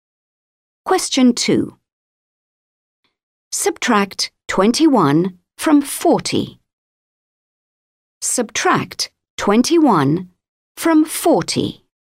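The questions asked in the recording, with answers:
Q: Subtract 21 from 40.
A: 19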